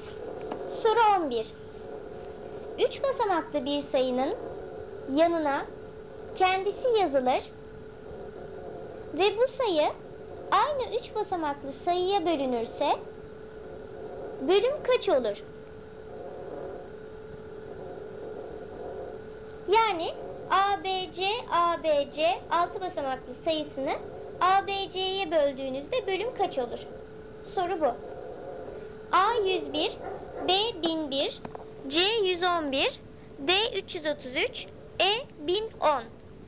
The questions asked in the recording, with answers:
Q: Yani ABC 6 basamaklı sayısını ABC'ye böldüğünüzde bölüm kaç olur?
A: Doğru cevap B seçeneği 1001.